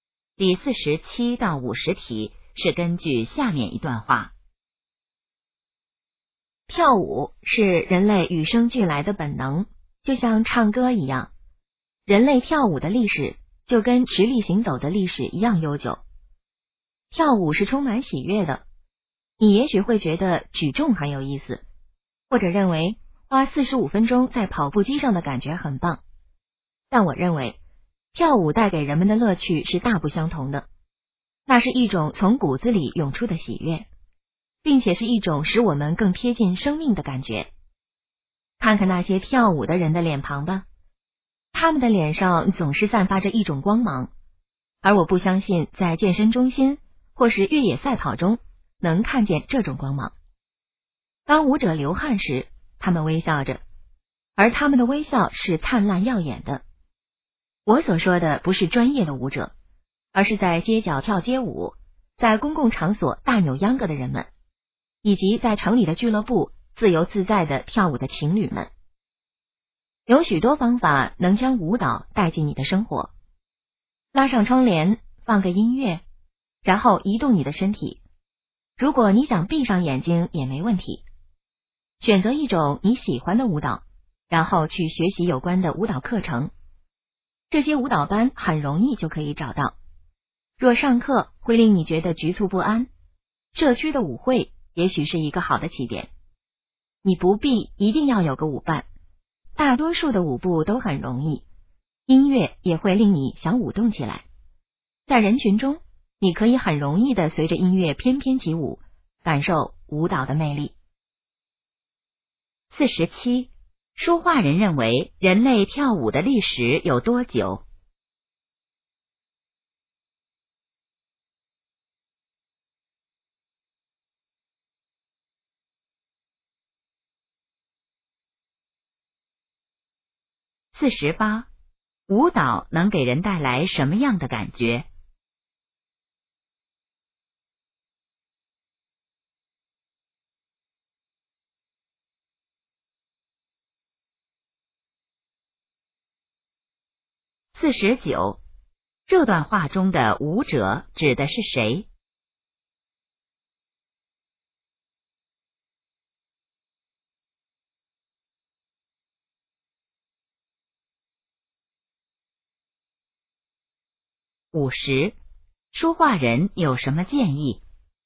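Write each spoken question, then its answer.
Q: 说话人认为人类跳舞的历史有多久?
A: 跟直立行走的历史一样悠久

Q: 舞蹈能给人带来什么样的感觉?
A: 喜悦,更贴近生命的感觉

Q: 这段话中的舞者指的是谁?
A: 普通人,不是专业舞者

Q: 说话人有什么建议?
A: 把舞蹈带进生活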